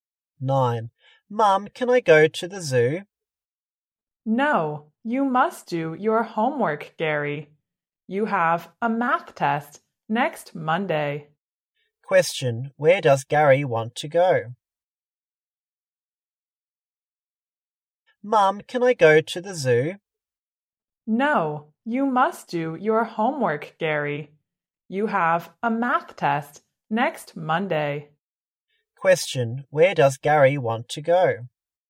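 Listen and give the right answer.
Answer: The zoo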